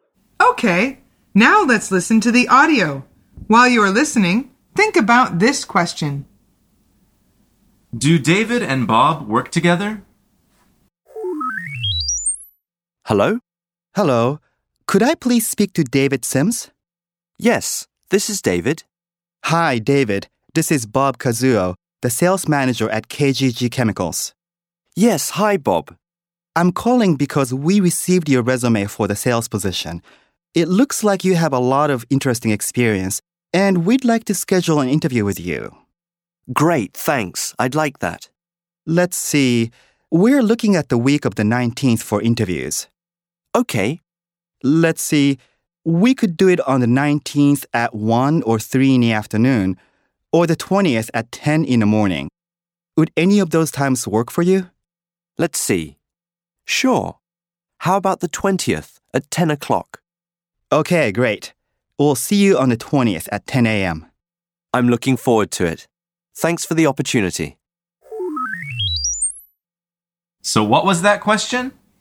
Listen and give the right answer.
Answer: The answer is no. They have not met before.